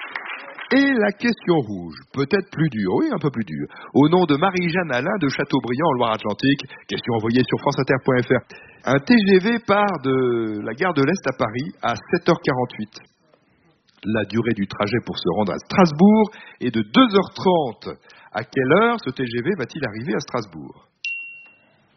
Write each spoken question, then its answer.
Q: À quelle heure ce TGV va-t-il arriver à Strasbourg?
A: 10h18! Waouh!